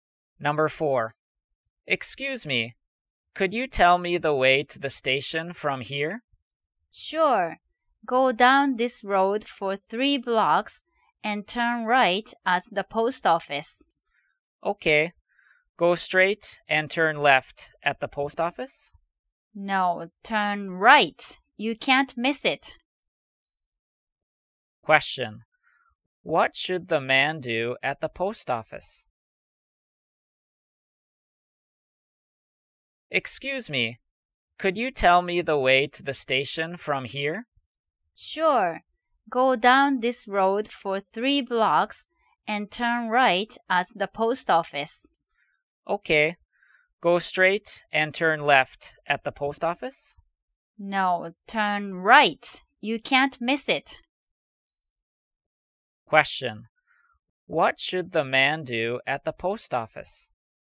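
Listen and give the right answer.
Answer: Turn right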